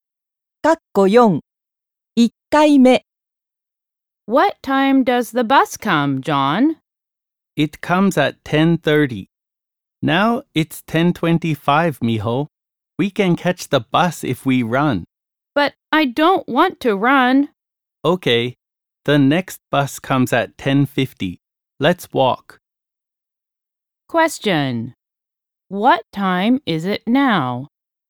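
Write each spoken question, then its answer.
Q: What time is it now?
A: 10:25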